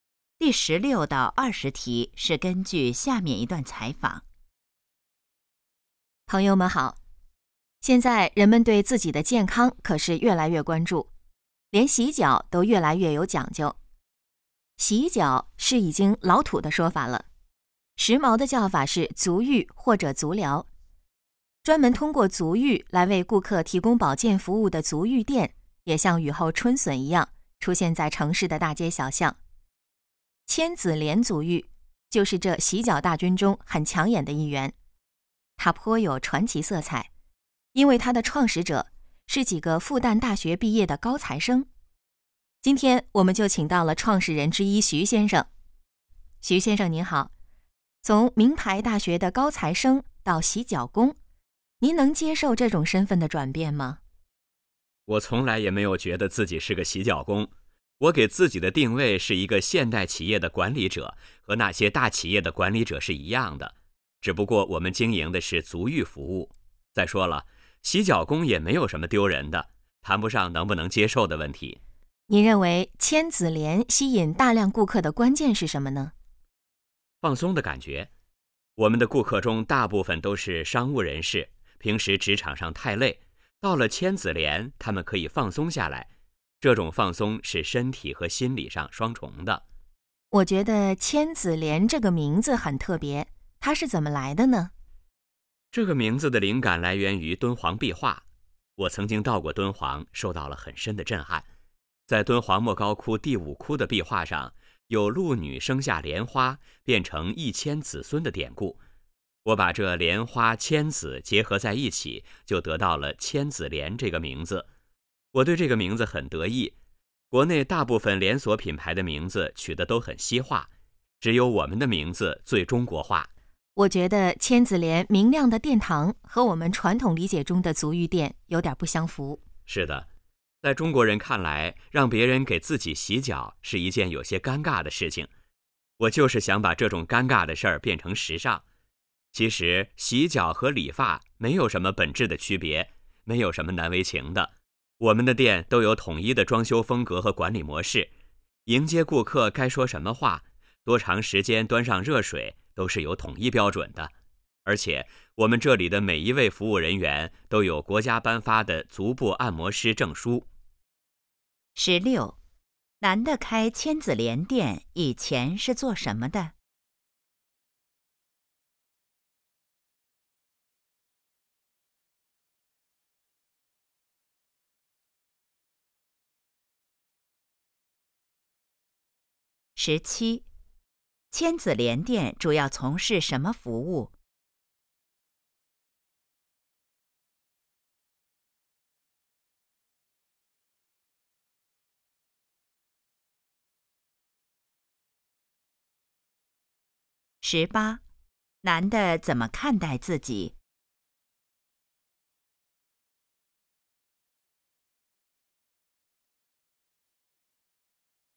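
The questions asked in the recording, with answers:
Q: 男的开千子莲店以前是做什么的?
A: 复旦大学毕业的高材生(学生)

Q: 千子莲店主要从事什么服务?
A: 足浴服务

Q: 男的怎么看待自己?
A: 现代企业的管理者

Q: 千子莲这个名字来自什么?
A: 敦煌壁画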